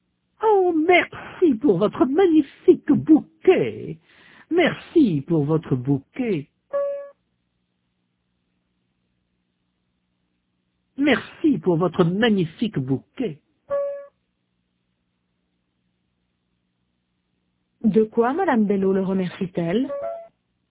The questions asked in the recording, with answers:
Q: De quoi Madame Bello le remercie-t-elle?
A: De son bouquet.